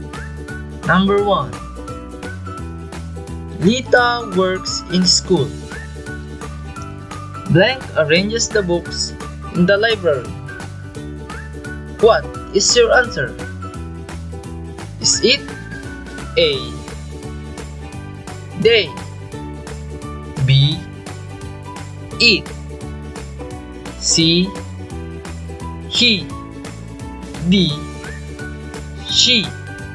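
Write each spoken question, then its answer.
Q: Lita works in school. Blank arranges the books in the library. What is your answer?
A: D: She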